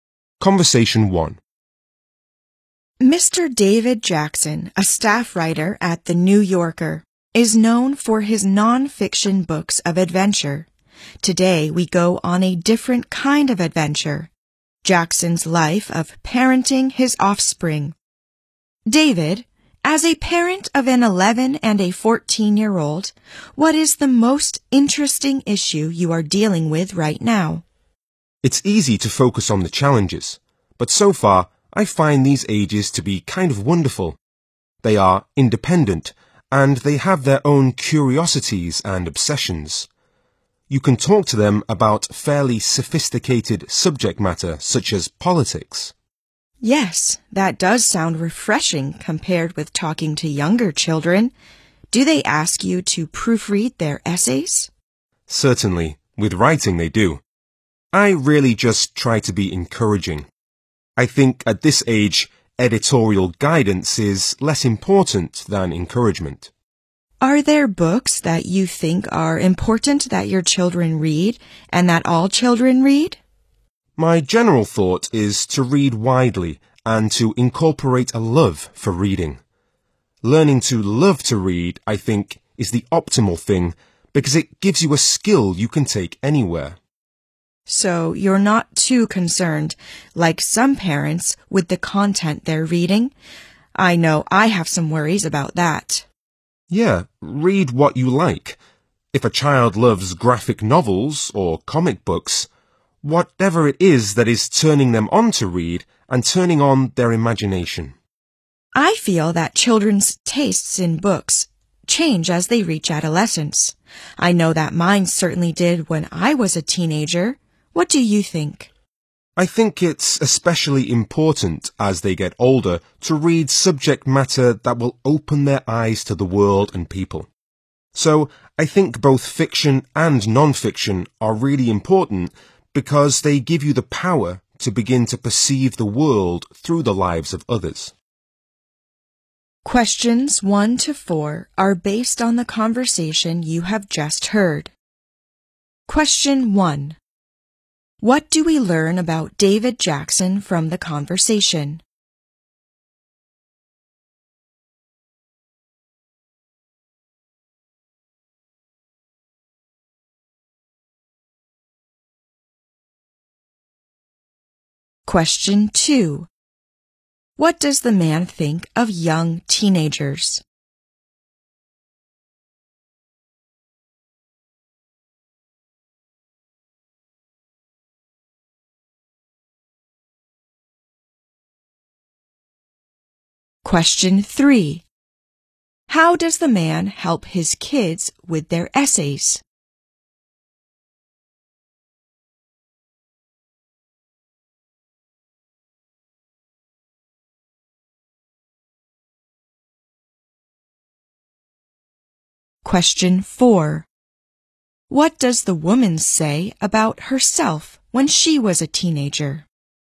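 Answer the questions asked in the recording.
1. He is a New Yorker staff writer known for non-fiction adventure books, and a parent of an 11- and a 14-year-old.
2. They are kind of wonderful: independent, with their own curiosities, and you can discuss sophisticated subjects with them.
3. He tries to encourage them.
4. Her taste in books changed.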